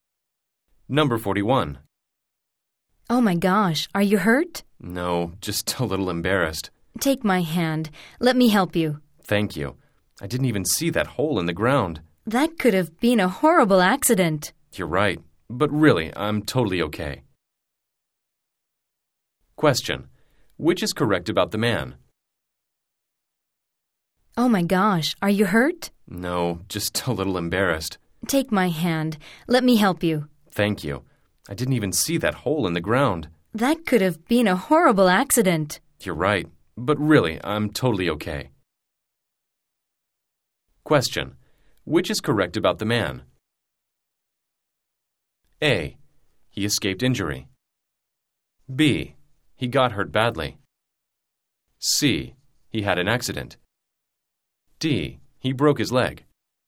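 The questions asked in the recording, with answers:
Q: Which is correct about the man?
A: A: He escaped injury.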